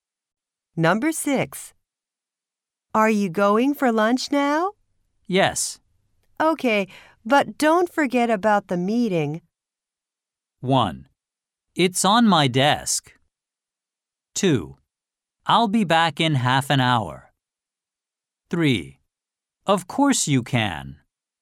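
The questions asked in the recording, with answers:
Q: Okay, but don't forget about the meeting.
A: 2: I'll be back in half an hour.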